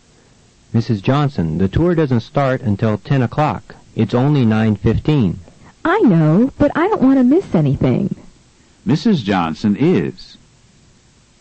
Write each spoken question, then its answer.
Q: Mrs. Johnson is?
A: Mrs. Johnson is early.